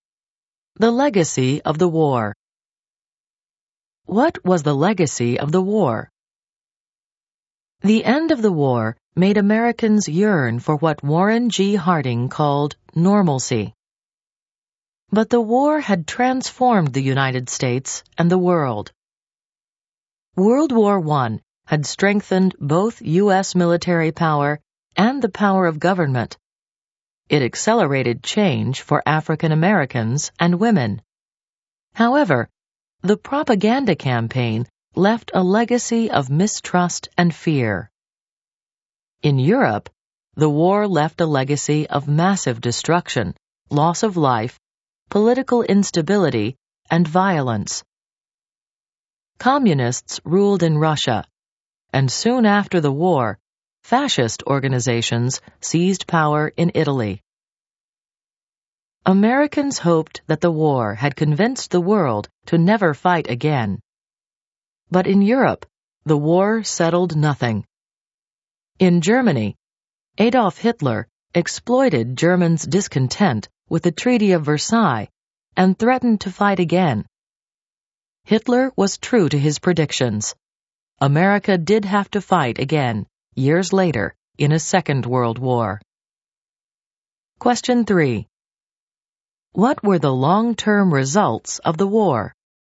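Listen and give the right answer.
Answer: Stronger U.S. military and government, change for African Americans and women, mistrust; in Europe destruction, instability, communism and fascism, and later World War II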